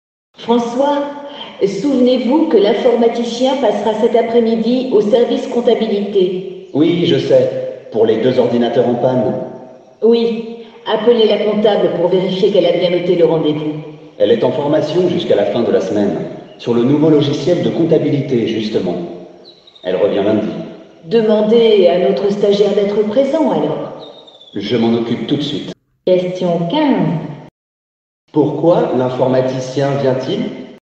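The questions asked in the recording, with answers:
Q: Pourquoi l'informaticien vient-il?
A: Pour réparer les deux ordinateurs en panne.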